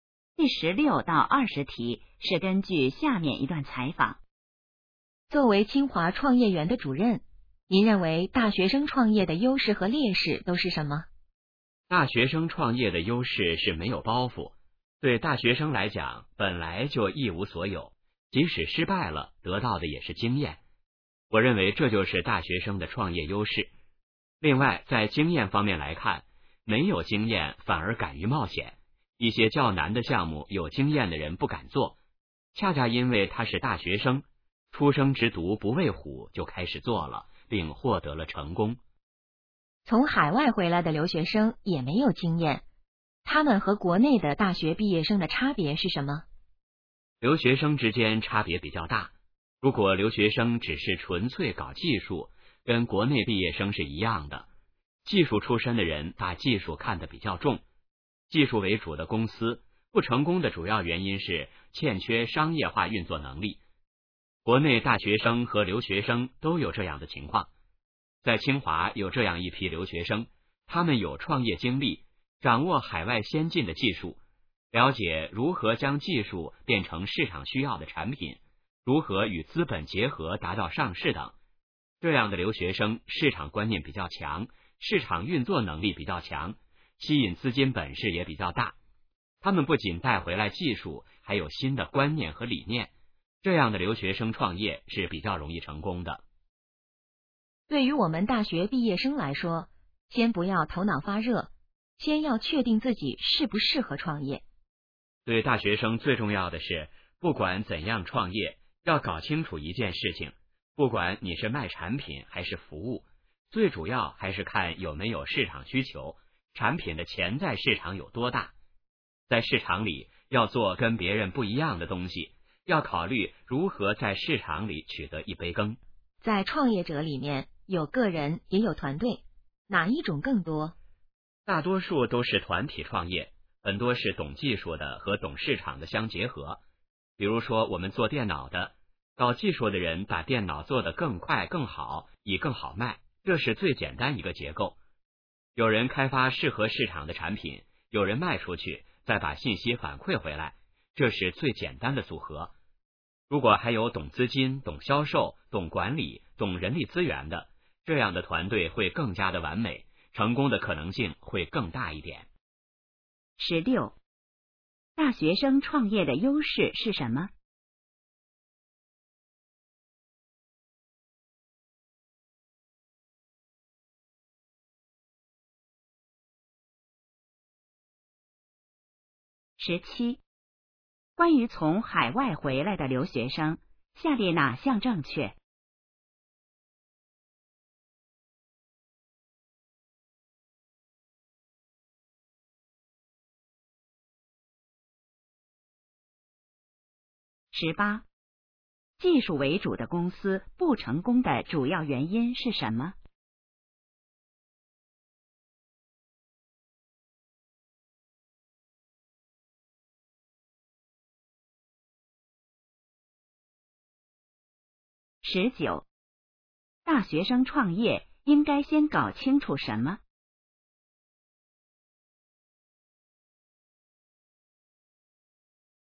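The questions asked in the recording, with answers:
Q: 大学生创业的优势是什么?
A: 没有包袱,失败了也能得到经验;没有经验反而敢于冒险

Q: 技术为主的公司不成功的主要原因是什么?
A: 欠缺商业化运作能力

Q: 大学生创业应该先搞清楚什么?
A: 有没有市场需求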